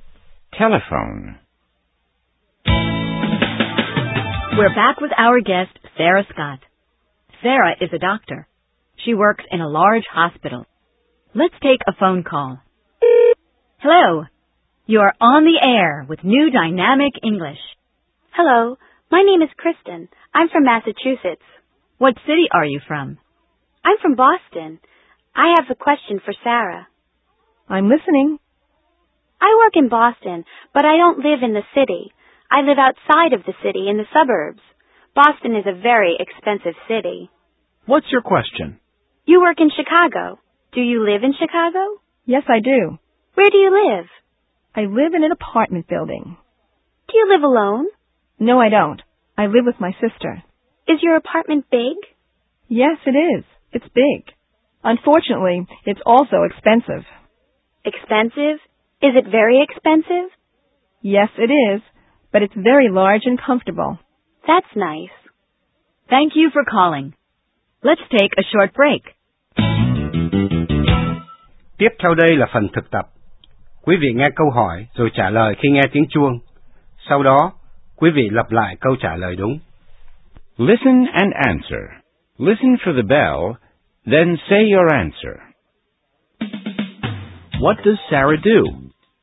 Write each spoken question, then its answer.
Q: What does Sarah do?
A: She's a doctor.